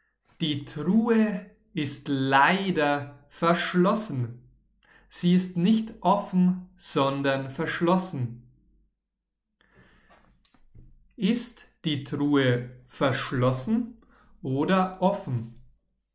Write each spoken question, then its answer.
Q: Ist die Truhe verschlossen oder offen?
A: Sie ist leider verschlossen.